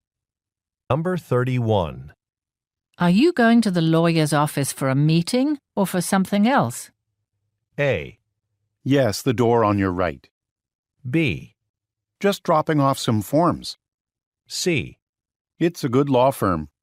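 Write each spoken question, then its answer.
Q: Are you going to the lawyer's office for a meeting or for something else?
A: B: Just dropping off some forms.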